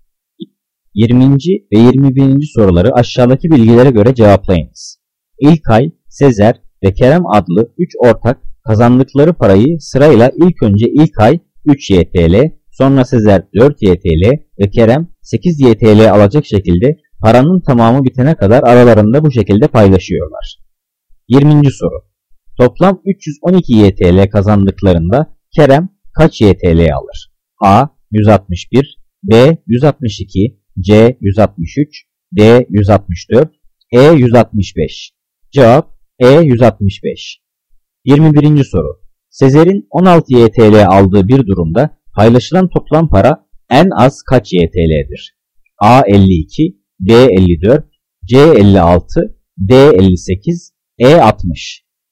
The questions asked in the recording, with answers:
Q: Toplam 312 YTL kazandıklarında Kerem kaç YTL alır?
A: Cevap E 165.

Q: Sezer'in 16 YTL aldığı bir durumda paylaşılan toplam para en az kaç YTL'dir?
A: Cevap A 52.